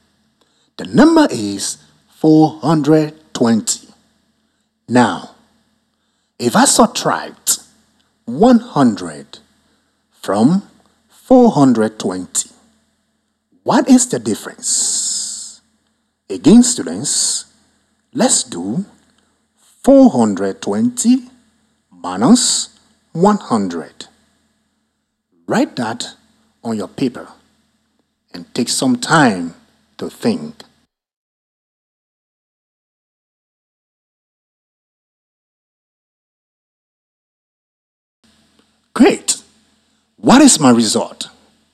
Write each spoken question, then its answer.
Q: Now, if I subtract 100 from 420, what is the difference?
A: So the difference is